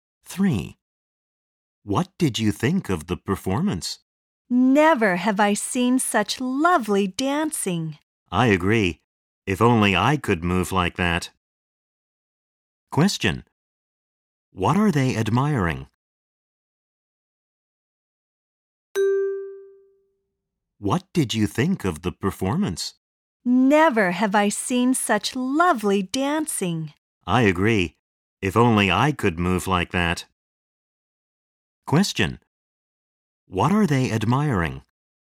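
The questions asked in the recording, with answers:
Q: What are they admiring?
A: The dancing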